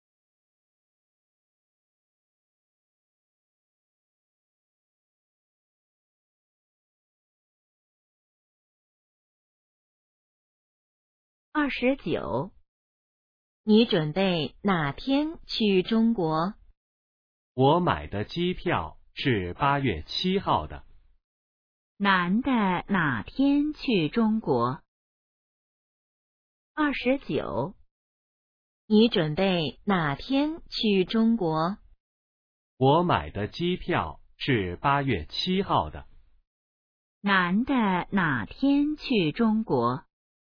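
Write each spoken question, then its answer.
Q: 男的哪天去中国?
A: 8月7号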